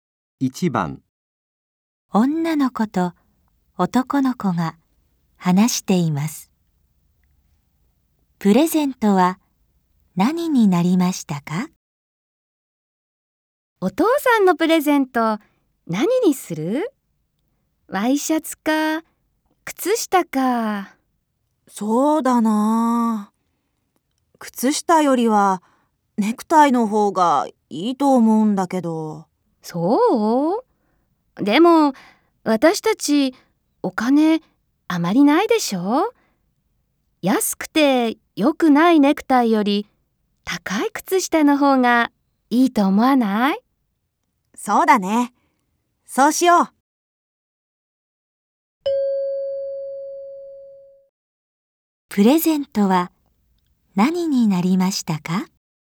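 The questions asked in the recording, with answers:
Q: プレゼントは何になりましたか?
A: 高い靴下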